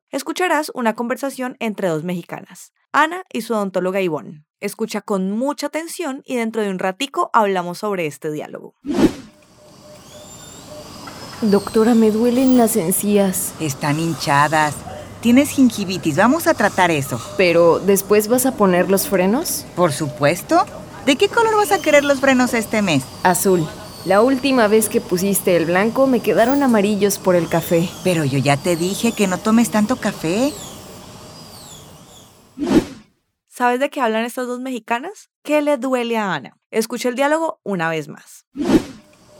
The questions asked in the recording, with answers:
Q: ¿Qué le duele a Ana?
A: Las encías.